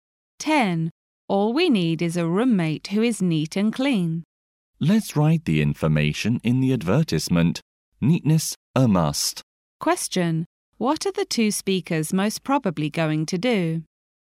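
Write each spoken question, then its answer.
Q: What are the two speakers most probably going to do?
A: Write an advertisement for a roommate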